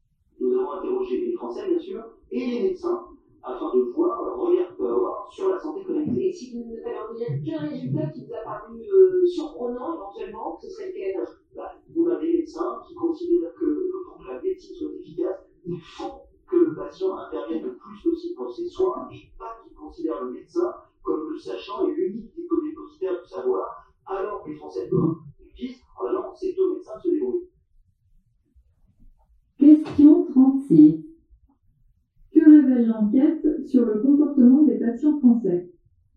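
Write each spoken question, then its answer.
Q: Que révèle l'enquête sur le comportement des patients français?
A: Ils ne veulent pas participer activement à leurs soins : pour eux, c'est au médecin de se débrouiller.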